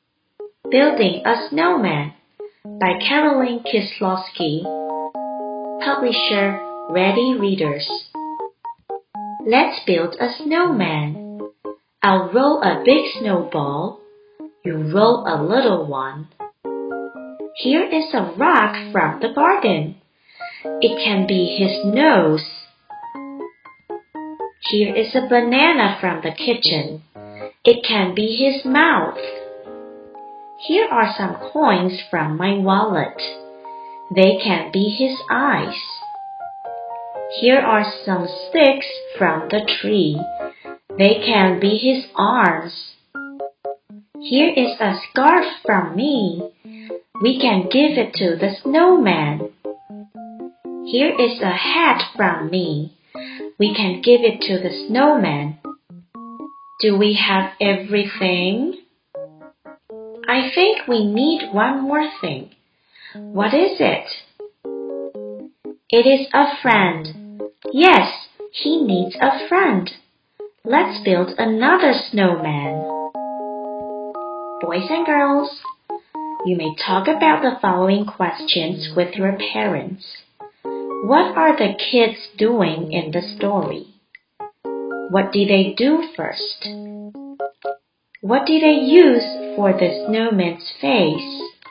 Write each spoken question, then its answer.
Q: What are the kids doing in the story?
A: Building a snowman.

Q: What do they do first?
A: Rolling a big snowball.